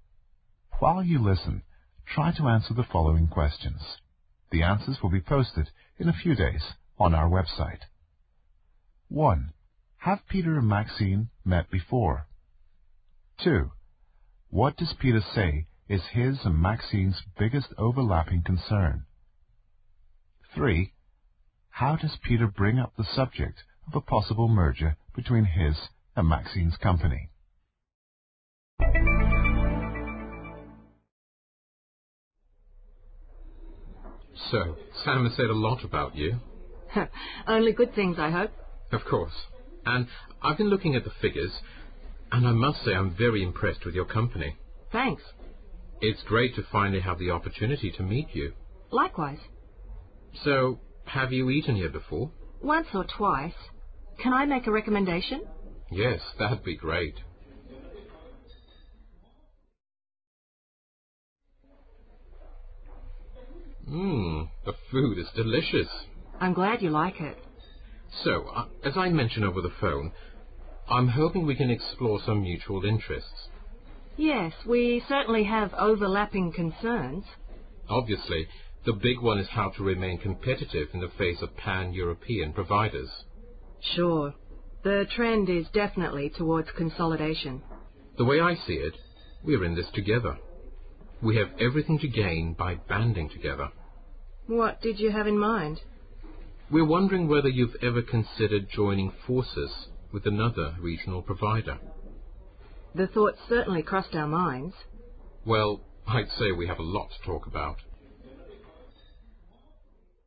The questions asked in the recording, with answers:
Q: What does Peter say is his and Maxine's biggest overlapping concern?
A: Obviously, the big one is how to remain competitive in the face of pan-European providers.

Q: How does Peter bring up the subject of a possible merger between his and Maxine's company?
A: Peter asks Maxine if she has ever considered joining forces.